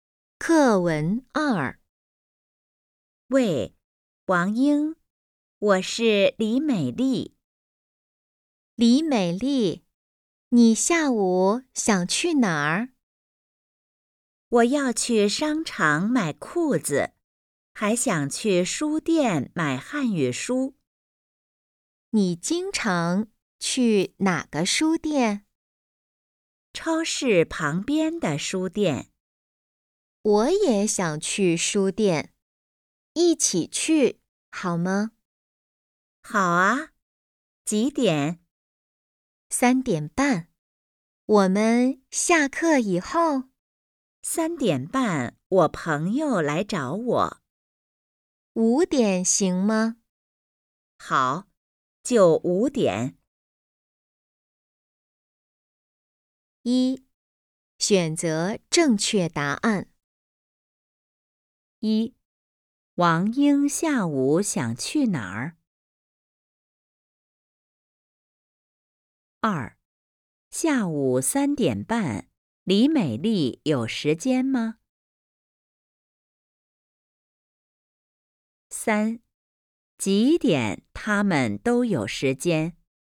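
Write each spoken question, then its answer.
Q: 下午3:30,李美丽有时间吗?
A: 没有时间

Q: 几点他们都有时间?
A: 5:00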